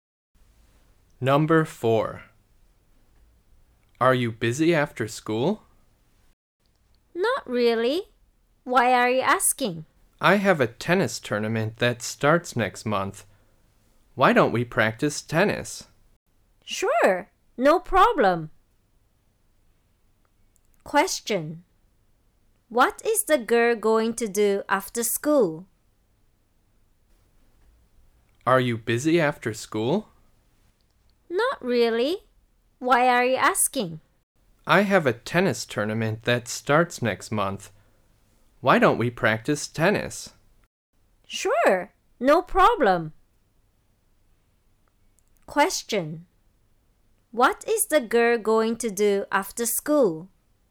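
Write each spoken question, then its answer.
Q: What is the girl going to do after school?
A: Practice tennis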